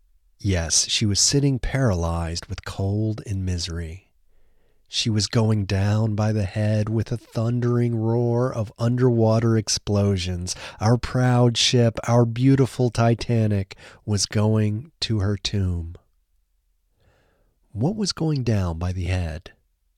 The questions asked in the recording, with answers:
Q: What was going down by the head?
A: The Titanic was going down by the head.